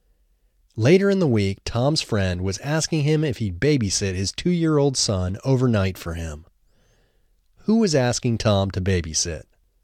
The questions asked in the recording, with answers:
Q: Who was asking Tom to babysit?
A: Tom's friend was asking him to babysit.